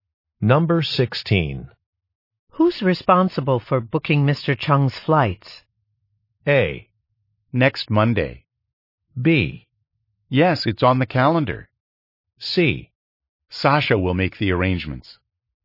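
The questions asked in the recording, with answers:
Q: Who's responsible for booking Mr. Chung's flights?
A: C: Sasha will make the arrangements.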